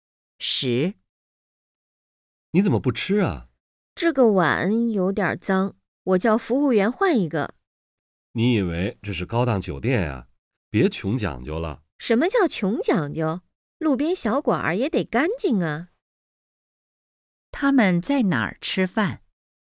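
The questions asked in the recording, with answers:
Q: 他们在哪儿吃饭?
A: 路边小馆儿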